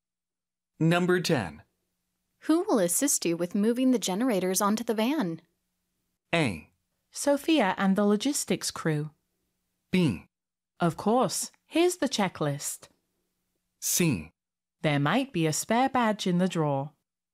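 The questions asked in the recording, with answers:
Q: Who will assist you with moving the generators onto the van?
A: A: Sophia and the logistics crew.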